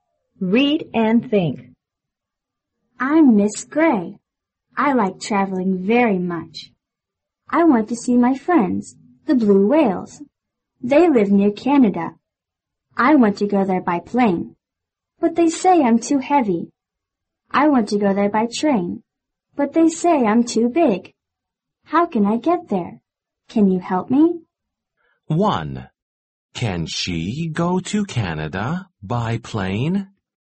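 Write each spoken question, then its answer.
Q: Can she go to Canada by plane?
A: No, she can't. She's too heavy.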